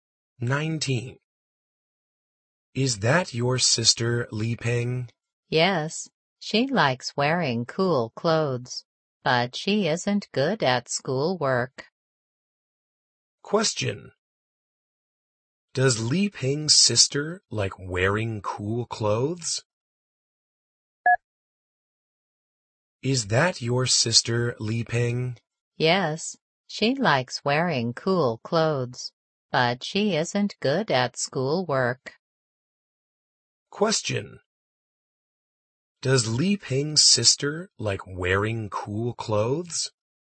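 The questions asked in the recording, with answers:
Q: Does Li Ping's sister like wearing cool clothes?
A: Yes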